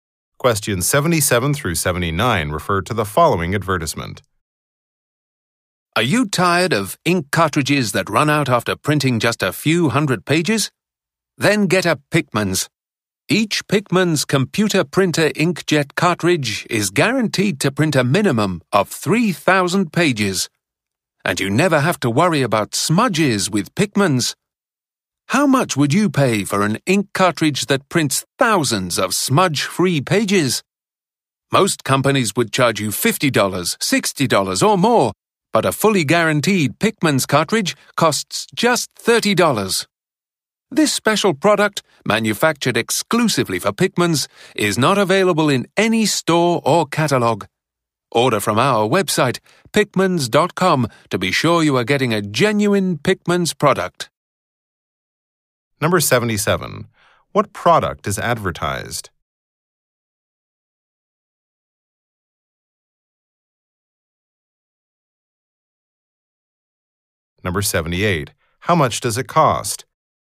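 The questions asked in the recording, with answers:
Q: What product is advertised?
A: Printer ink cartridges

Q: How much does it cost?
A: $30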